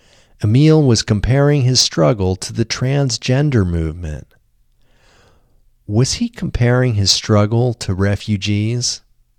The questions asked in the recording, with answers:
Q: Was he comparing his struggle to refugees?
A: No, he wasn't comparing his struggle to refugees.